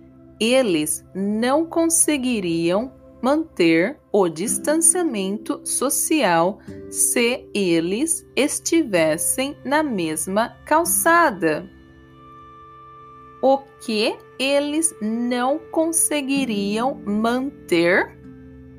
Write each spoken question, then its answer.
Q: O que eles não conseguiriam manter?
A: eles não conseguiriam manter o distanciamento social se estivessem na mesma calçada.